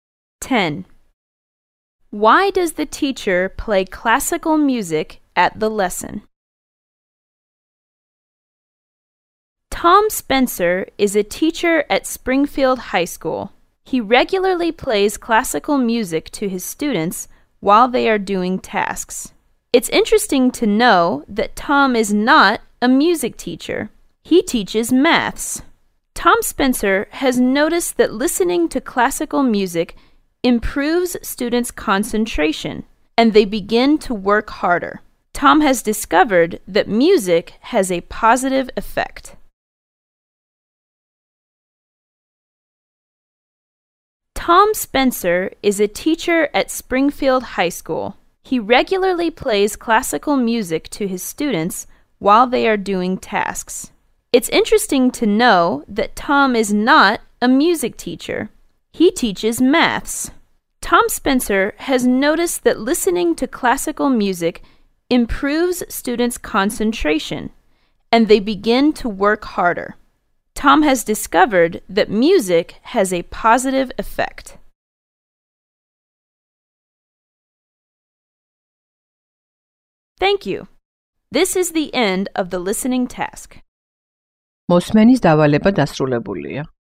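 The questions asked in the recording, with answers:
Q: Why does the teacher play classical music at the lesson?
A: It improves students' concentration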